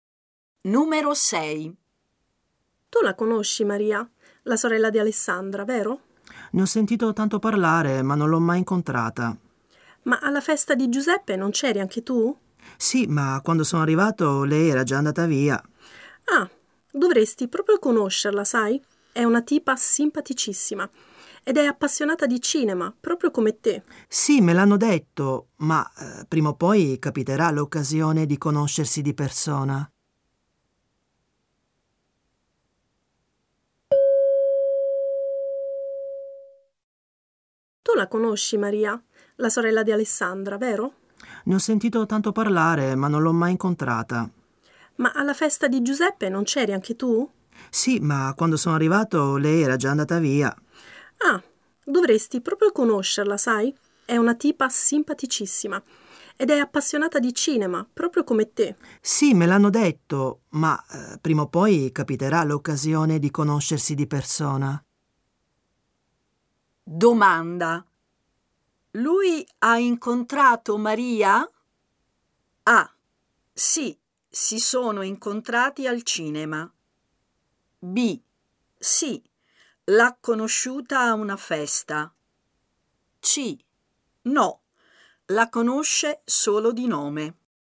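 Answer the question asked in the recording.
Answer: C: No, la conosce solo di nome.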